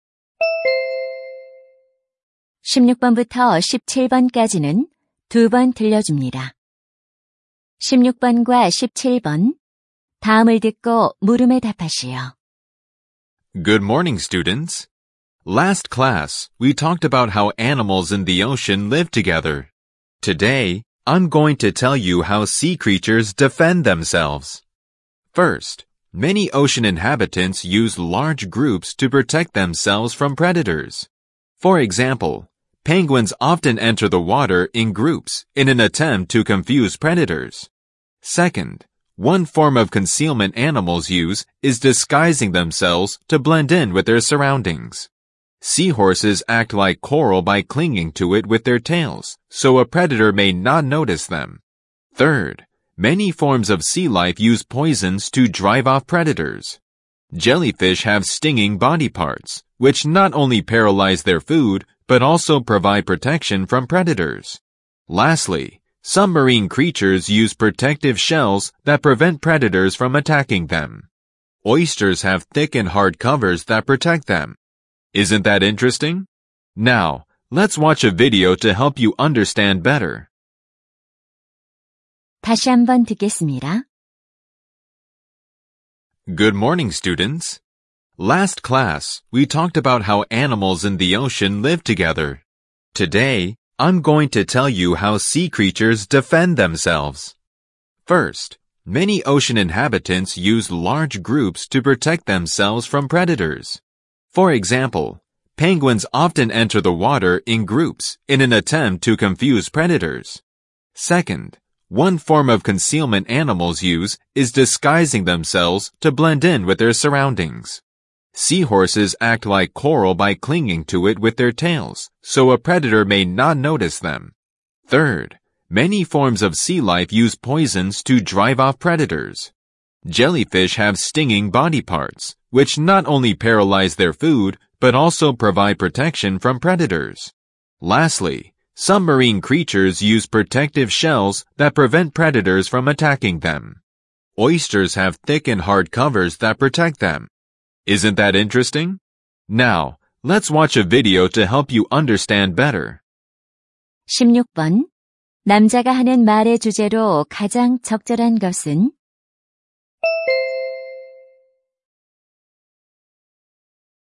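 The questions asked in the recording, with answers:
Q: 남자가 하는 말의 주제로 가장 적절한 것은?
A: 해양 생물이 스스로를 방어하는 방법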